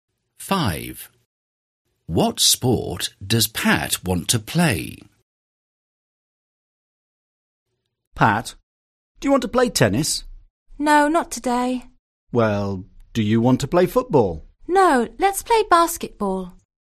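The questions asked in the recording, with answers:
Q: What sport does Pat want to play?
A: Basketball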